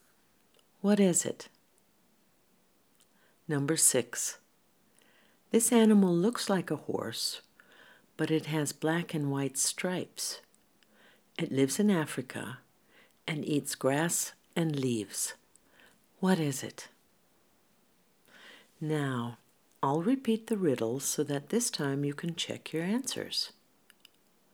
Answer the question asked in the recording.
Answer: You're right, it's a zebra.